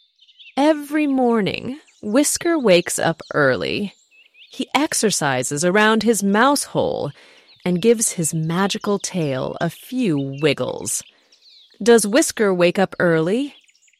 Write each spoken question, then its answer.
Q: Does Whisker wake up early?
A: Yes, he does. He wakes up early every morning.